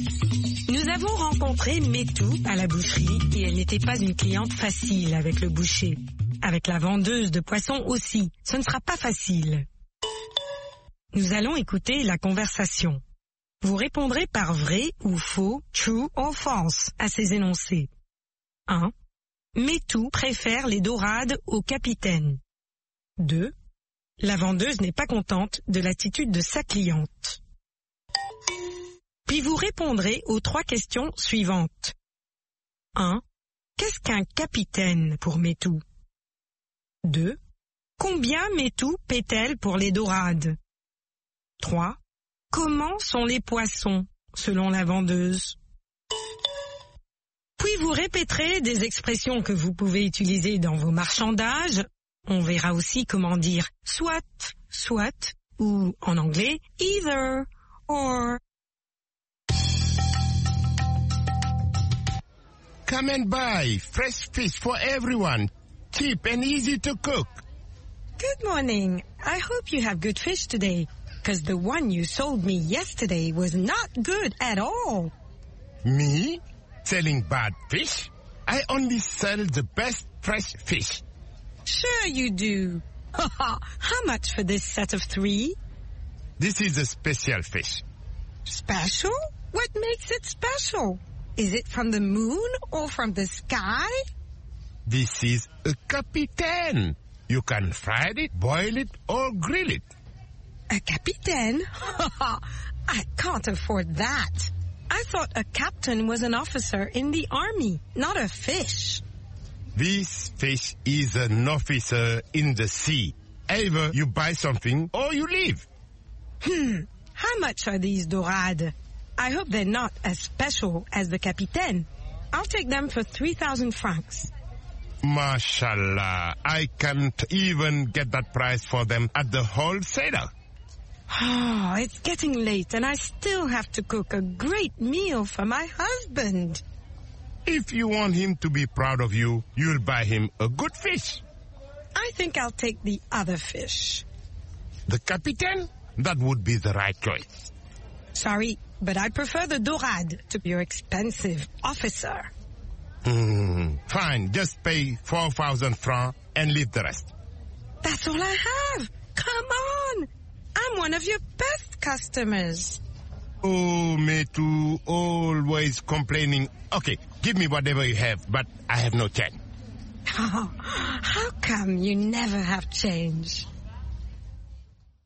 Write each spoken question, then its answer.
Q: Metou préfère les dorades au capitaine.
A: L'énoncé 1 est vrai. Metou préfère les dorades au capitaine.

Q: La vendeuse n'est pas contente de l'attitude de sa cliente.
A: L'énoncé 2 est vrai. La vendeuse n'est pas contente de l'attitude de sa cliente.

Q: Qu'est-ce qu'un capitaine pour Metou?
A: Pour elle, un capitaine est un officier de l'armée.

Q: Comment sont les poissons, selon la vendeuse?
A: Ils sont frais.